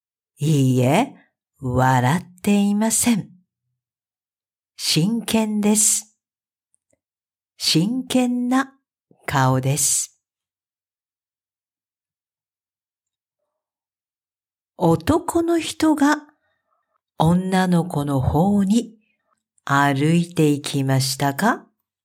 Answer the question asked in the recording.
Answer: いいえ、違います。女の子が男の人の方に歩いていきました。